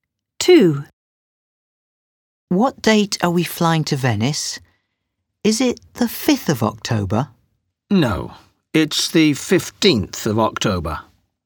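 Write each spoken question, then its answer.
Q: What date are we flying to Venice?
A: The 15th of October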